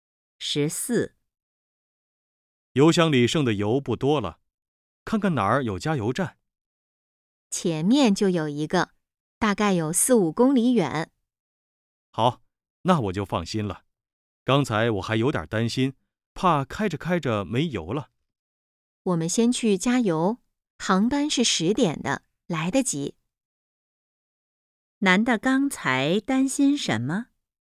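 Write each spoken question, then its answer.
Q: 男的刚才担心什么?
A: 车开着开着没油了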